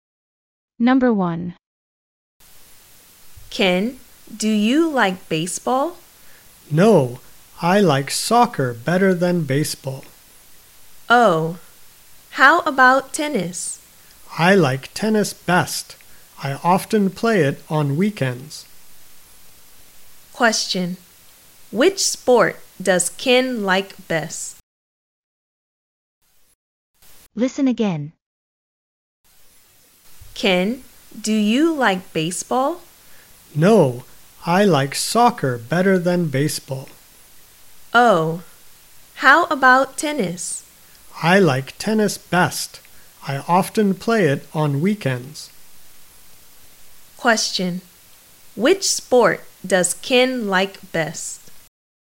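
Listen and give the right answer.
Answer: Tennis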